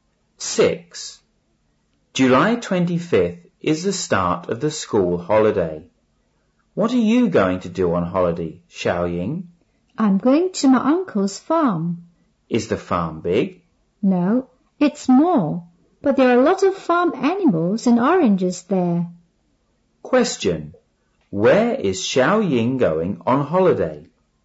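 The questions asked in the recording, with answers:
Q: Where is Xiaoying going on holiday?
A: To her uncle's farm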